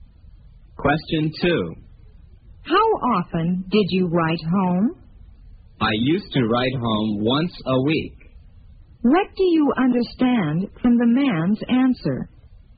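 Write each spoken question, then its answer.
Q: What do you understand from the man's answer?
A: He wrote home once a week in the past but no longer does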